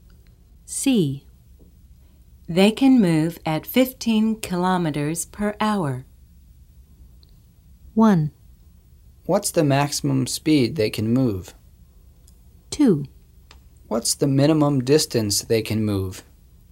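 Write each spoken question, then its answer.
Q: They can move at 15 kilometers per hour.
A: 1: What's the maximum speed they can move?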